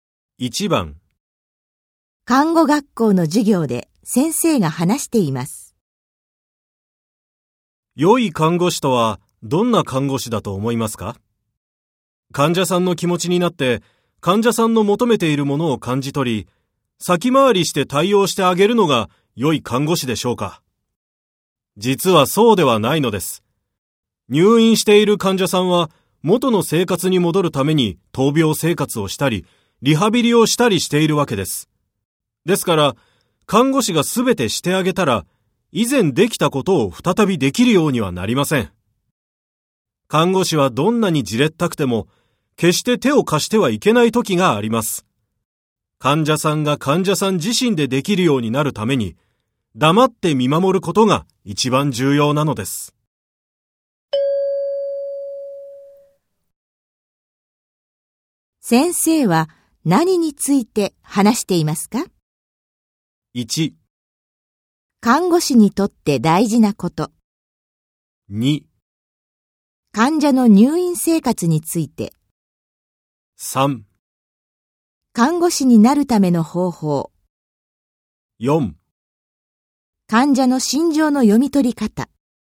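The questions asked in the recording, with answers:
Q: 先生は何について話していますか?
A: 1: 看護師にとって大事なこと。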